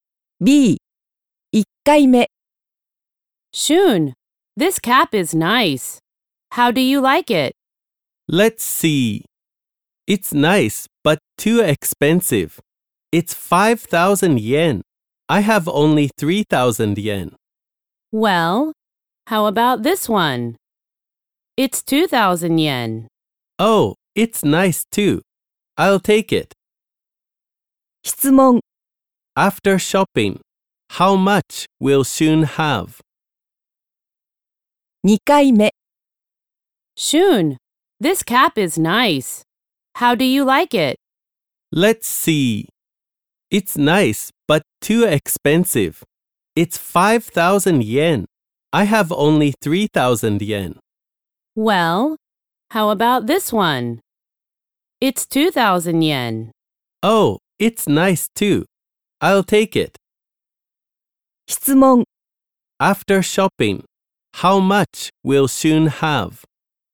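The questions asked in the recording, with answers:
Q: After shopping, how much will Shun have?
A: 1,000 yen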